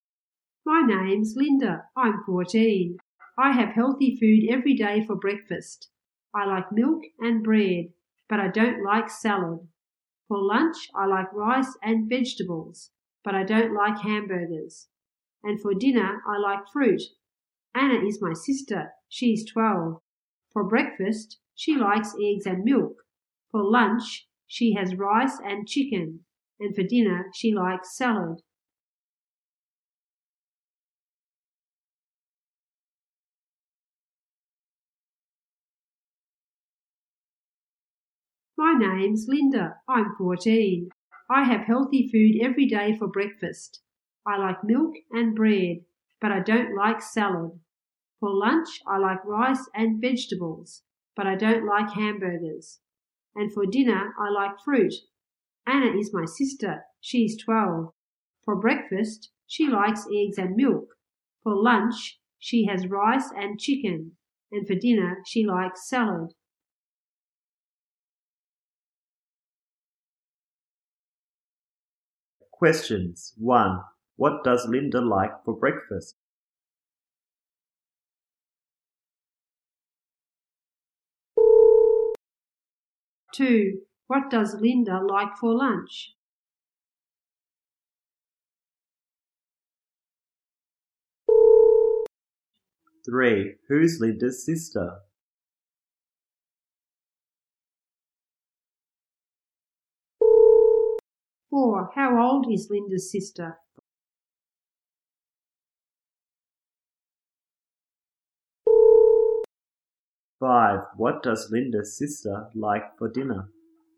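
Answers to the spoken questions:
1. Milk and bread
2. Rice and vegetables
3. Anna
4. 12
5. Salad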